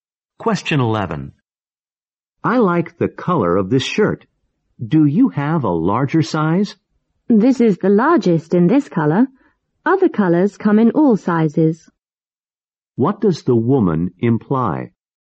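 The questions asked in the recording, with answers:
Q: What does the woman imply?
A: There is no larger size in this color, but other colors come in all sizes.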